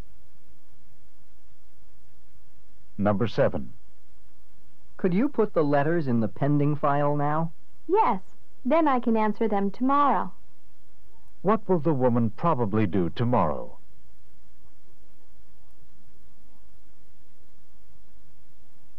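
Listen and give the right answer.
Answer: Answer the letters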